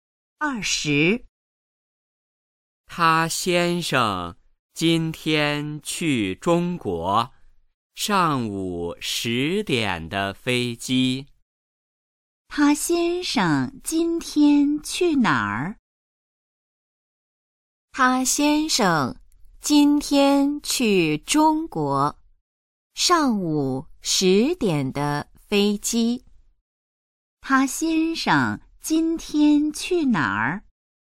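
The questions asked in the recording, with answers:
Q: 他先生今天去哪儿?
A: 中国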